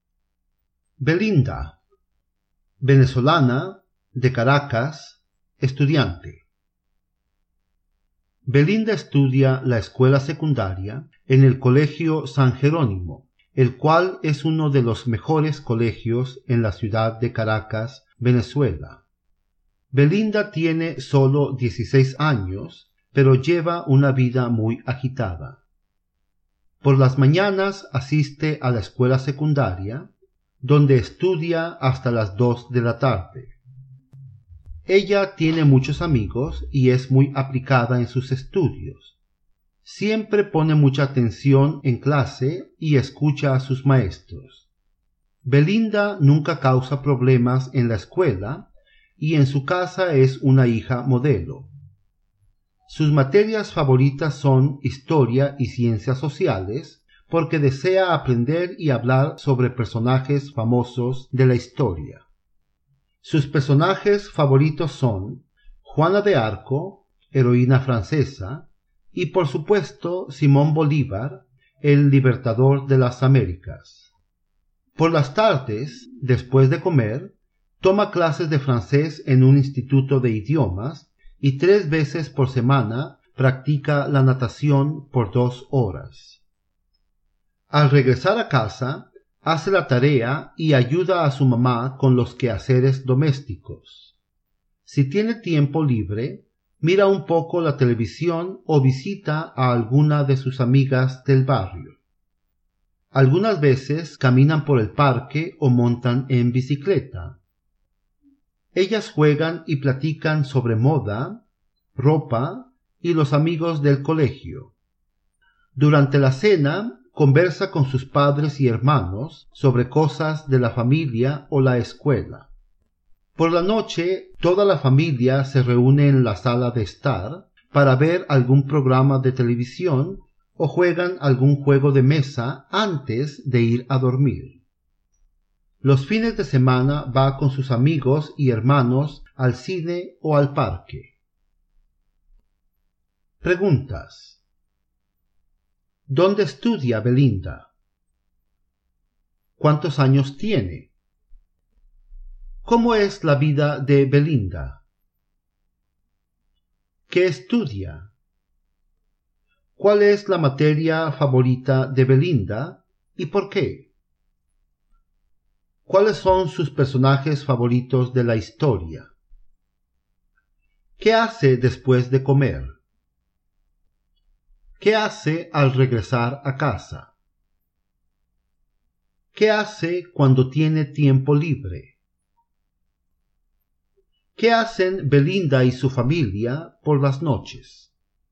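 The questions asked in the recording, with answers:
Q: ¿Dónde estudia Belinda?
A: En el Colegio San Jerónimo, en Caracas

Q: ¿Cuántos años tiene?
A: 16 años

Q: ¿Cómo es la vida de Belinda?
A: Muy agitada

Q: ¿Qué estudia?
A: La escuela secundaria

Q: ¿Cuál es la materia favorita de Belinda y por qué?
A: Historia y ciencias sociales, porque desea aprender y hablar sobre personajes famosos de la historia

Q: ¿Cuáles son sus personajes favoritos de la historia?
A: Juana de Arco y Simón Bolívar

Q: ¿Qué hace después de comer?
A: Toma clases de francés y tres veces por semana practica natación

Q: ¿Qué hace al regresar a casa?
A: Hace la tarea y ayuda a su mamá con los quehaceres domésticos

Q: ¿Qué hace cuando tiene tiempo libre?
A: Mira un poco la televisión o visita a alguna amiga del barrio

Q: ¿Qué hacen Belinda y su familia por las noches?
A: Se reúnen en la sala para ver televisión o jugar algún juego de mesa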